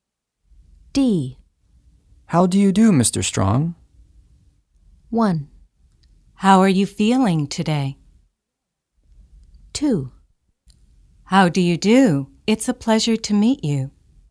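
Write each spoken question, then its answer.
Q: How do you do, Mr. Strong?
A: 2: How do you do? It's a pleasure to meet you.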